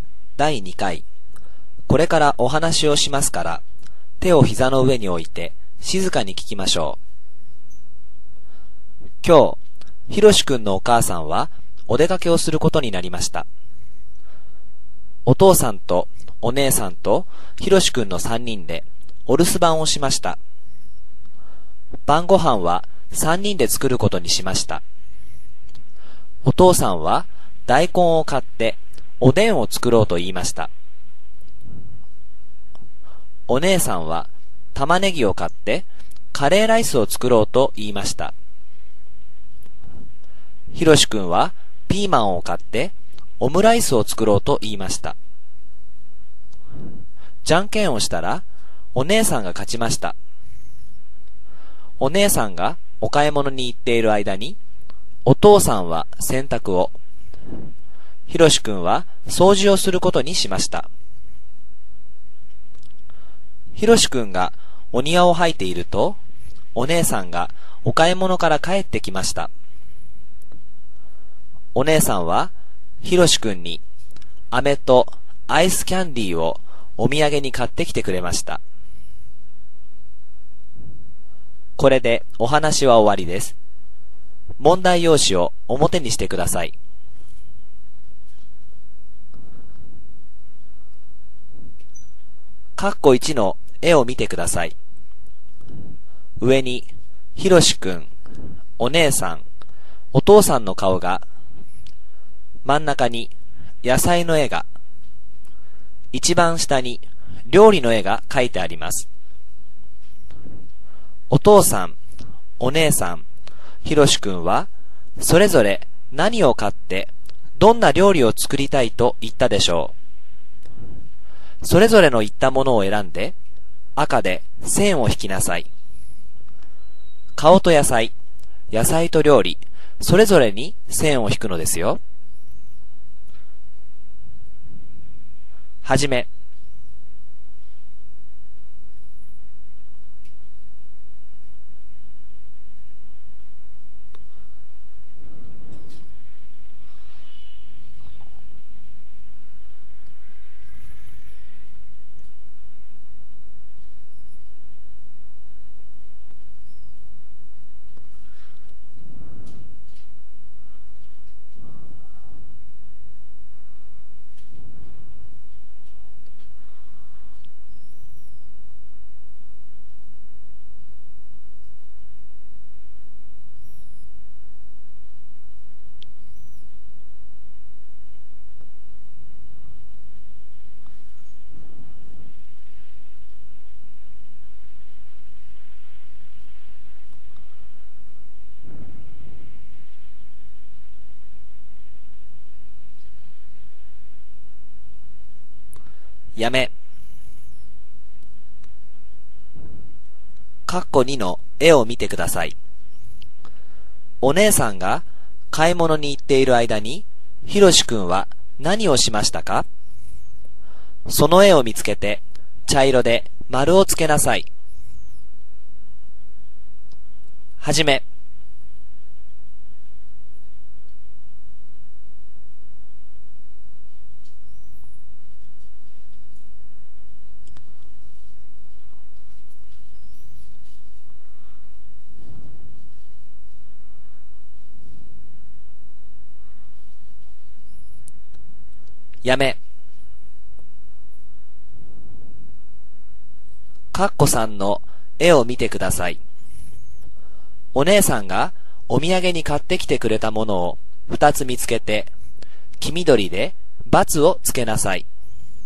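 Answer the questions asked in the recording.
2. 掃除(お庭を掃いた)
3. 飴とアイスキャンディー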